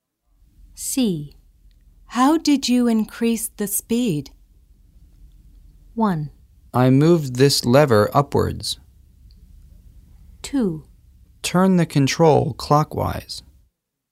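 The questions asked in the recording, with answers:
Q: How did you increase the speed?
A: 1: I moved this lever upwards.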